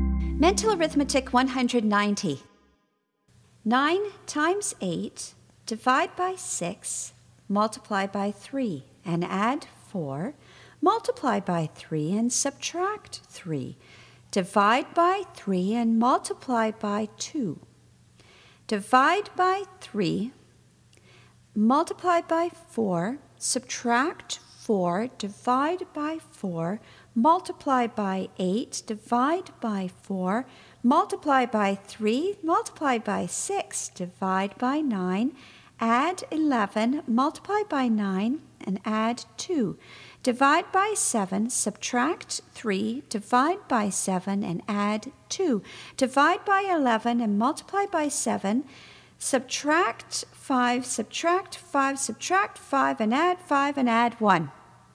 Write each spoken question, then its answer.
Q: 9 times 8, divide by 6, multiply by 3, and add 4. Multiply by 3 and subtract 3. Divide by 3 and multiply by 2. Divide by 3, multiply by 4, subtract 4, divide by 4, multiply by 8, divide by 4, multiply by 3, multiply by 6, divide by 9, add 11, multiply by 9, and add 2. Divide by 7, subtract 3, divide by 7, and add 2. Divide by 11 and multiply by 7, subtract 5, subtract 5, subtract 5, and add 5, and add 1.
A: And the answer is 5.